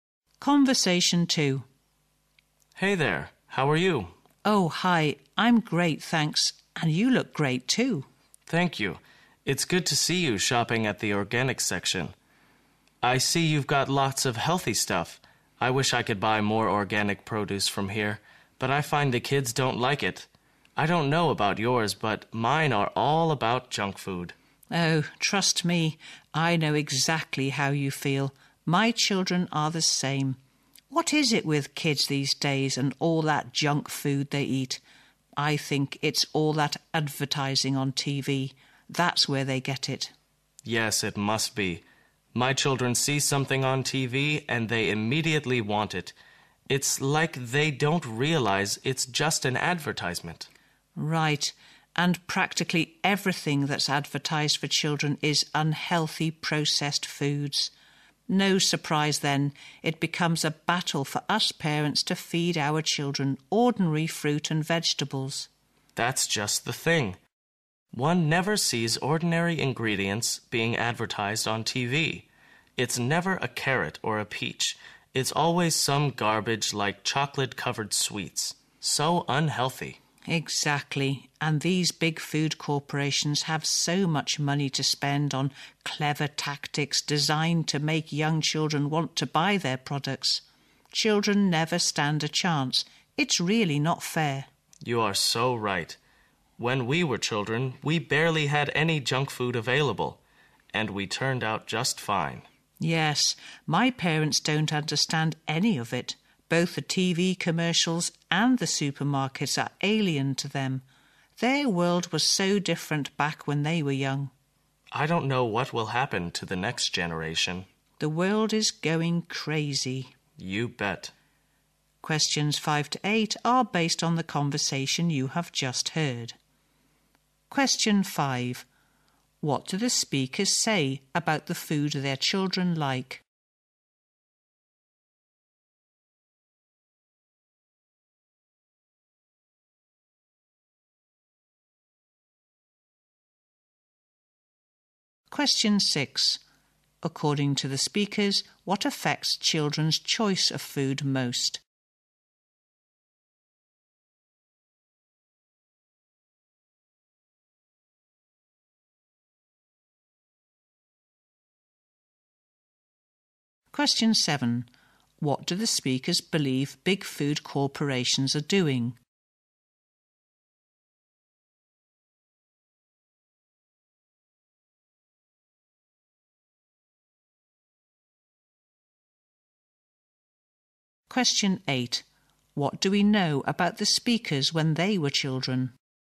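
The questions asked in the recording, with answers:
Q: What do the speakers say about the food their children like?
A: Their children like junk food

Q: According to the speakers, what affects children's choice of food most?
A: TV advertising

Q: What do the speakers believe big food corporations are doing?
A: Spending lots of money on clever tactics to make children want their products

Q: What do we know about the speakers when they were children?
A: They had barely any junk food available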